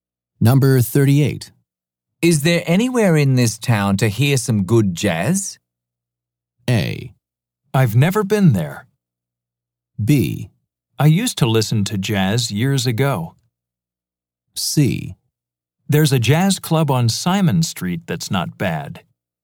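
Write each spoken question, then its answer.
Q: Is there anywhere in this town to hear some good jazz?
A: C: There's a jazz club on Simon Street that's not bad.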